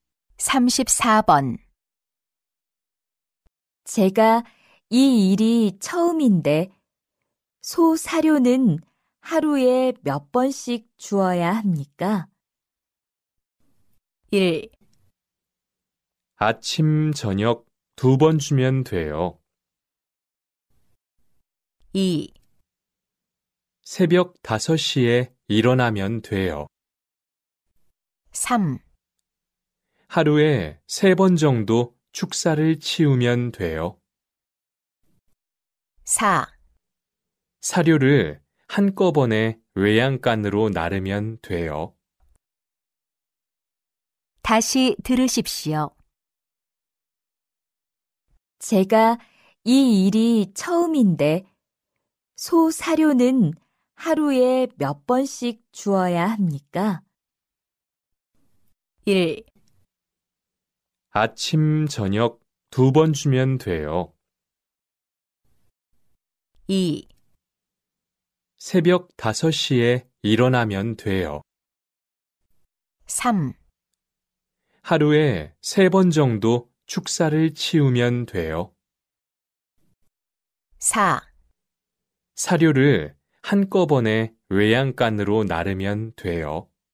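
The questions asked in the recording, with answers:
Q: 제가 이 일이 처음인데 소 사료는 하루에 몇 번씩 주어야 합니까?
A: 1: 아침, 저녁 두 번 주면 돼요.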